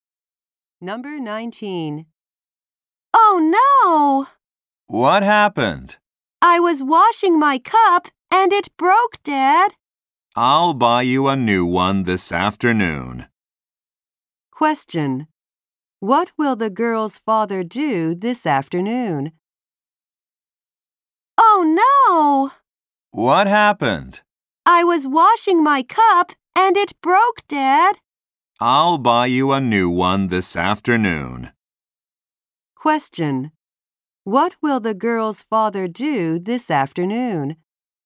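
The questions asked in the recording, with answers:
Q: What will the girl's father do this afternoon?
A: Buy her a new cup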